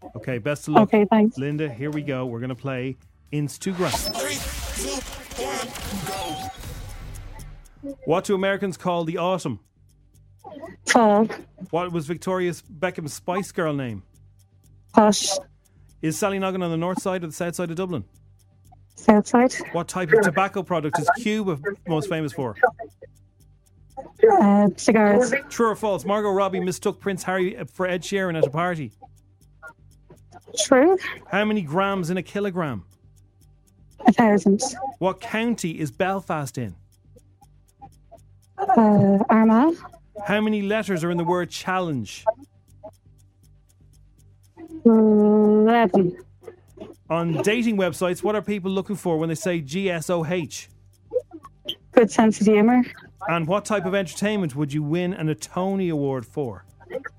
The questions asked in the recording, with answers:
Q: What do Americans call the autumn?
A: The fall.

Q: What was Victoria Beckham's Spice Girl name?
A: It was Posh.

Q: What type of tobacco product is Cuba most famous for?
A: It's cigars.

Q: True or false? Margot Robbie mistook Prince Harry for Ed Sheeran at a party.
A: The answer is true.

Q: How many grams in a kilogram?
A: 1,000. You got that right.